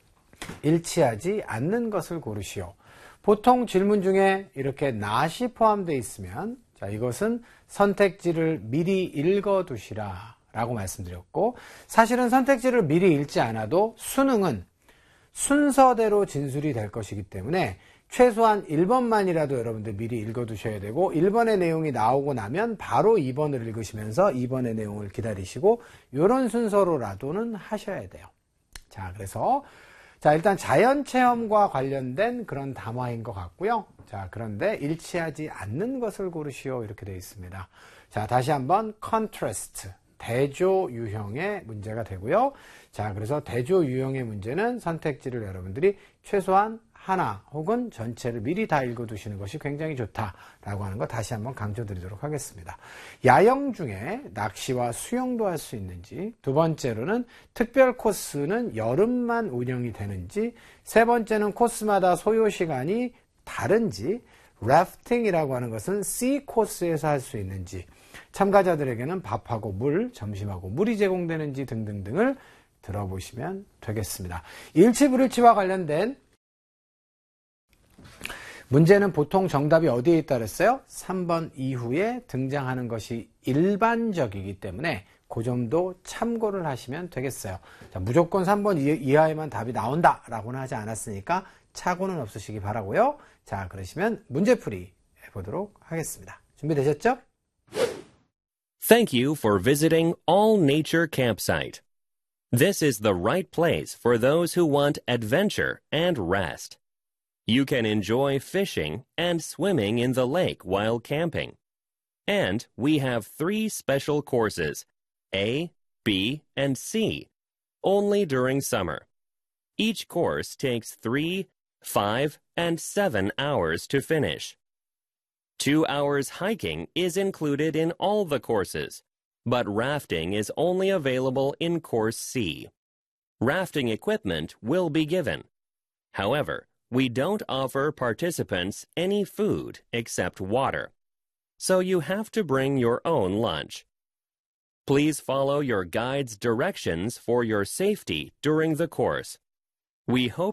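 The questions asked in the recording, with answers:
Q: 일치하지 않는 것을 고르시오.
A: 5: 참가자들에게 점심과 물이 제공된다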